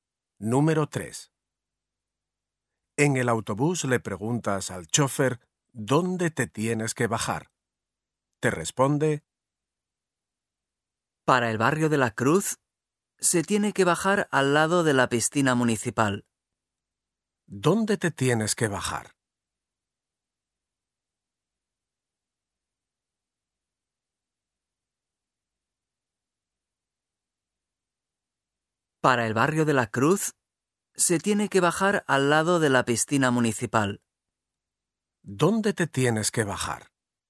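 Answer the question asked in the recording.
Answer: Al lado de la piscina municipal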